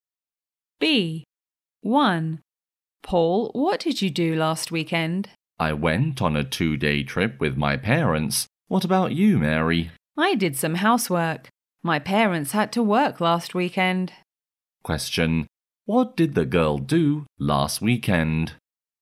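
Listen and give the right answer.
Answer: She did some housework.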